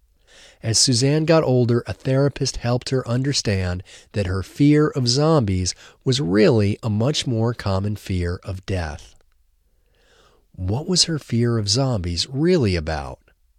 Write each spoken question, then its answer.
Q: What was her fear of zombies really about?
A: Her fear of zombies was really a fear of death.